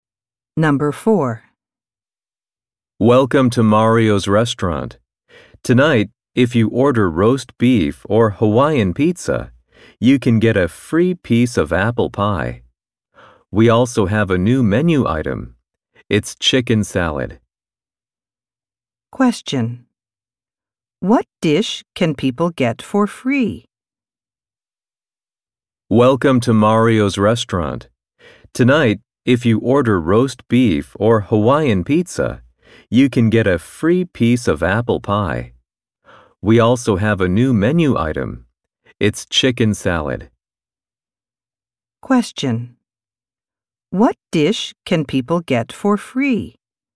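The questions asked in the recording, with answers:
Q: What dish can people get for free?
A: Apple pie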